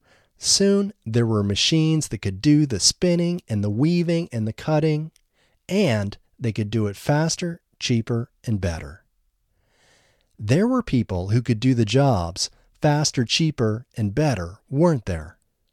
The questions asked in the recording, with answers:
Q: There were people who could do the jobs faster, cheaper, and better, weren't there?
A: No, there weren't people who could do the jobs faster, cheaper, and better.